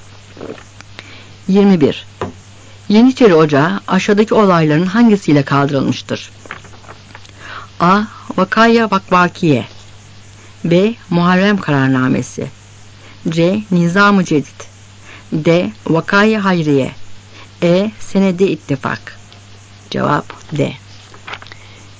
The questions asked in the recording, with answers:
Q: Yeniçeri Ocağı aşağıdaki olayların hangisiyle kaldırılmıştır?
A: Cevap D.